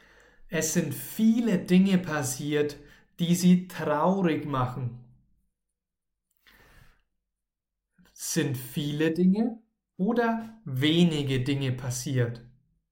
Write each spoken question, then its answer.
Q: Sind viele Dinge oder wenige Dinge passiert?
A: Viele, ganz, ganz viele.